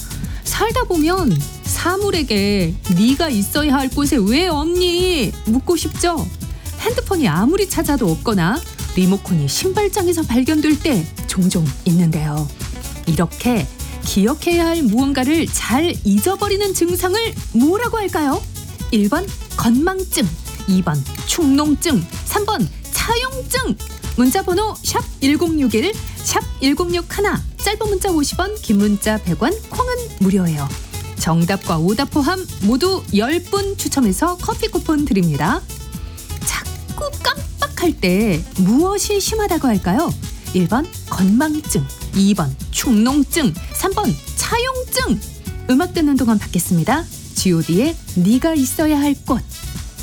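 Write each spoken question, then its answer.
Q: 이렇게 기억해야 할 무언가를 잘 잊어버리는 증상을 뭐라고 할까요?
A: 1: 건망증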